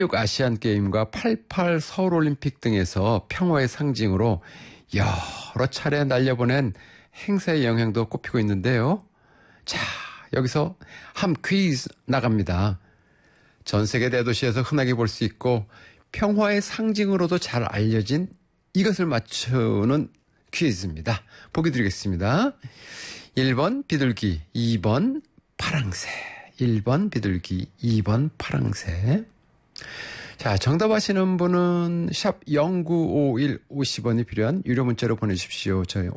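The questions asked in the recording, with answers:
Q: 전 세계 대도시에서 흔하게 볼수 있고 평화의 상징으로도 잘 알려진 이것을 맞추는 퀴즈입니다.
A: 1: 비둘기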